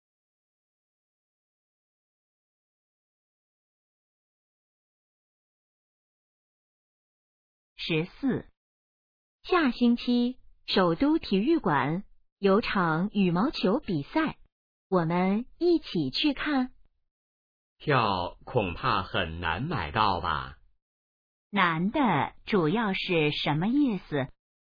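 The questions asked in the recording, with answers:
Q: 难的主要是什么意思?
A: 票很难买到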